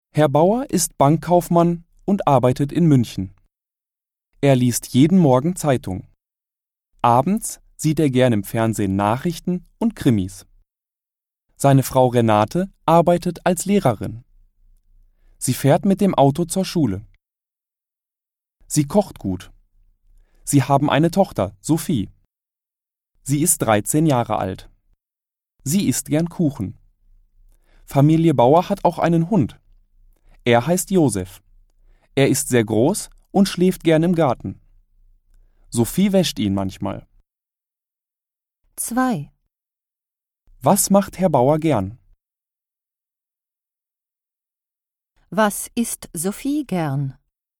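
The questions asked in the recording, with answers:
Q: Was macht Herr Bauer gern?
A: Abends sieht er gern Nachrichten und Krimis im Fernsehen.

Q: Was isst Sophie gern?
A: Kuchen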